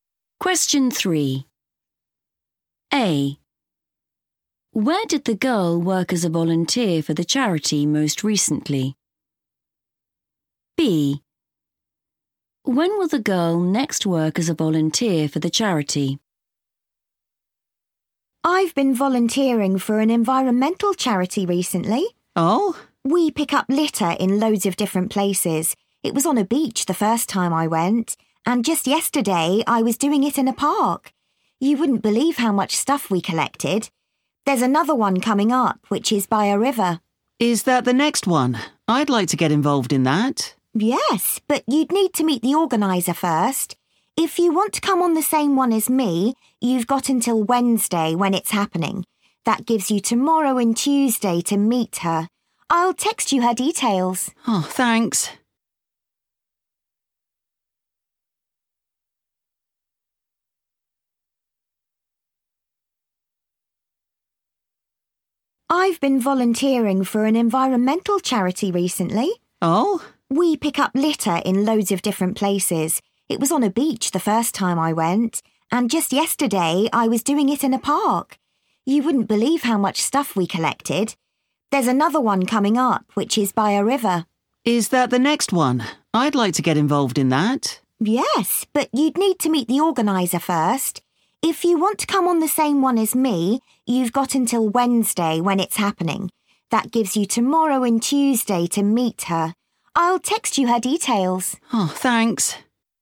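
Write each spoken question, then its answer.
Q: Where did the girl work as a volunteer for the charity most recently?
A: in a park

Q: When will the girl next work as a volunteer for the charity?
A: Wednesday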